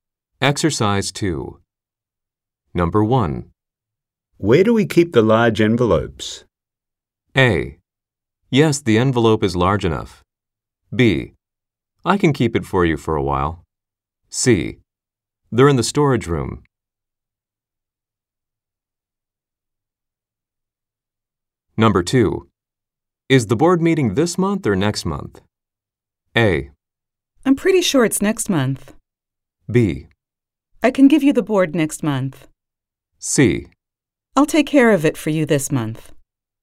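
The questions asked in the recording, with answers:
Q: Where do we keep the large envelopes?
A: C: They're in the storage room.

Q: Is the board meeting this month or next month?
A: A: I'm pretty sure it's next month.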